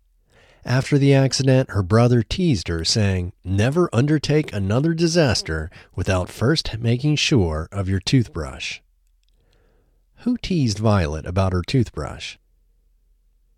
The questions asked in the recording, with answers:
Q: Who teased Violet about her toothbrush?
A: Her brother teased Violet about her toothbrush.